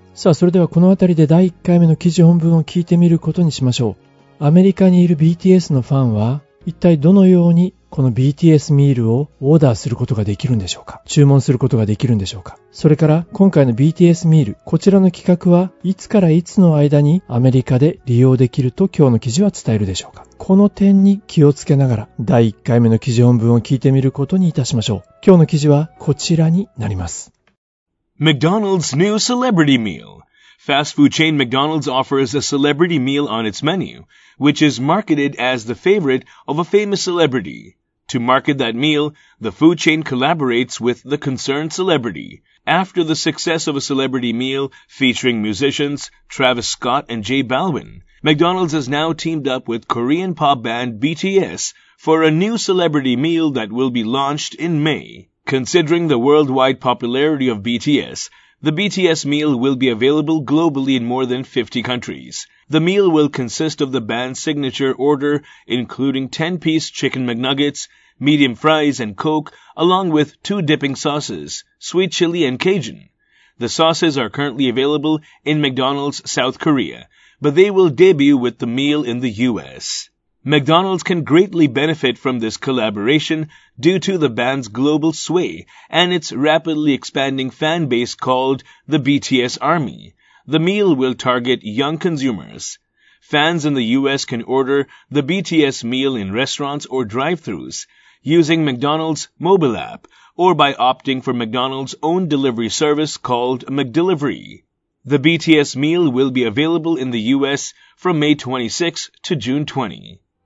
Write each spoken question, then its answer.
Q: アメリカにいる BTS のファンは、一体どのようにこの BTS ミールをオーダーすることができるんでしょうか?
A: Fans in the US can order the BTS meal in restaurants or drive-thrus using McDonald's mobile app or by opting for McDonald's own delivery service called McDelivery.

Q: 今回の BTS ミール、こちらの企画はいつからいつの間にアメリカで利用できると今日の記事は伝えるでしょうか?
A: ということですね。From May 26 to June 20.